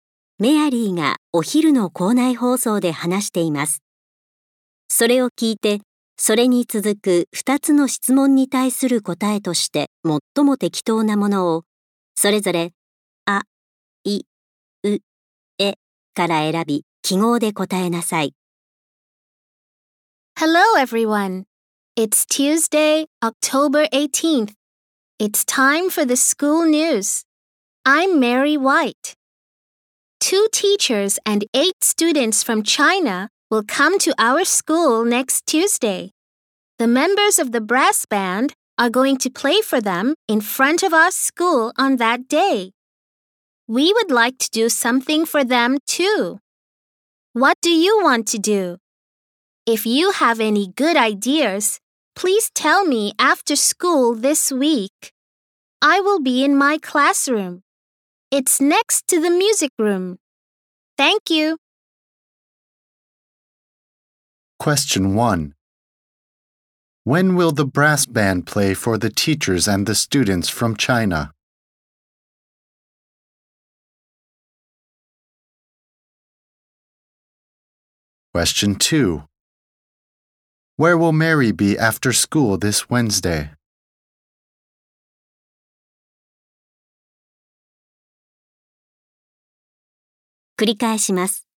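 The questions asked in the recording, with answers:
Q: When will the brass band play for the teachers and the students from China?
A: Next Tuesday

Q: Where will Mary be after school this Wednesday?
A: In her classroom, next to the music room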